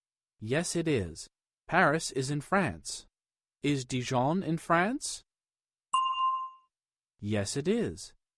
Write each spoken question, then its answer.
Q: Is Dijon in France?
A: Yes, it is.